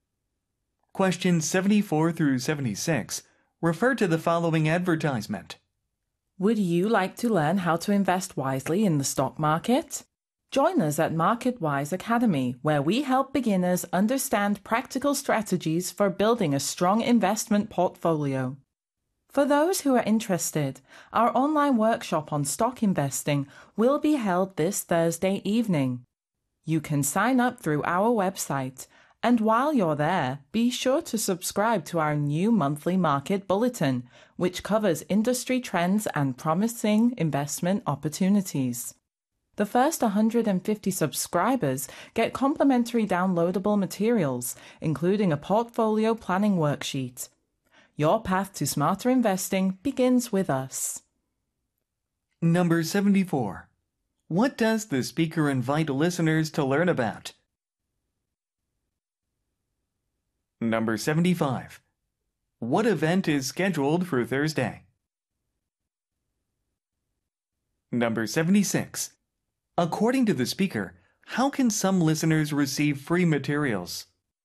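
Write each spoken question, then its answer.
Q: What does the speaker invite listeners to learn about?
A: Investing in the stock market

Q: What event is scheduled for Thursday?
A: An online workshop on stock investing

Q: According to the speaker, how can some listeners receive free materials?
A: By being among the first 150 subscribers to the monthly market bulletin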